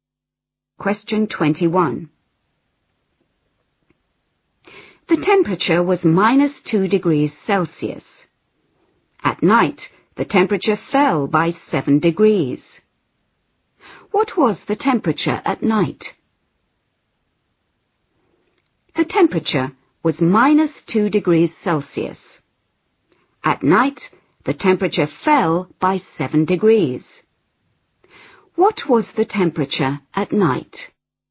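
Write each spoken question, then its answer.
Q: What was the temperature at night?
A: -9 degrees Celsius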